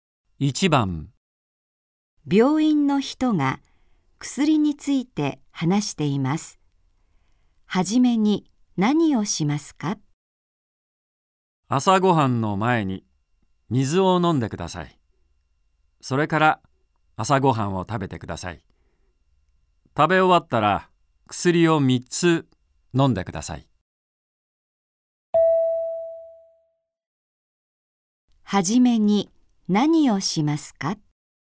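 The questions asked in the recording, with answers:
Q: はじめに何をしますか?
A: 水を飲む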